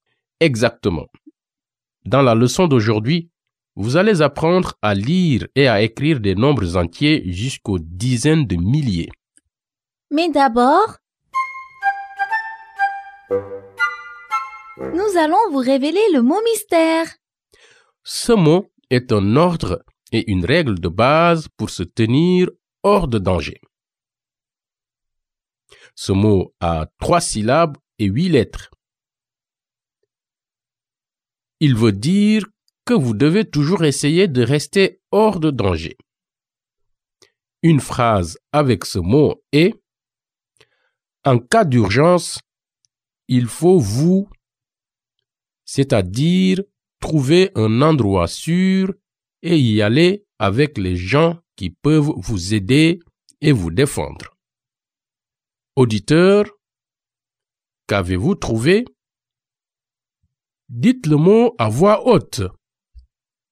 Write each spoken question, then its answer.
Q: Auditeur, qu'avez-vous trouvé?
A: Le mot mystère est protéger.